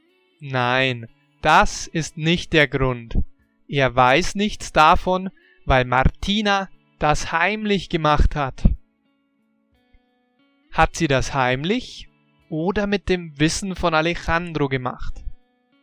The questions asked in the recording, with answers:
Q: Hat sie das heimlich oder mit dem Wissen von Alejandro gemacht?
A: Heimlich. Sie hat das heimlich gemacht.